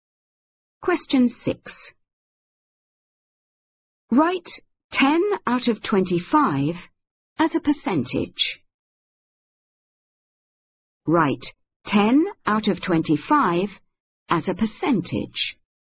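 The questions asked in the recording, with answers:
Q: Write 10 out of 25 as a percentage.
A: 40%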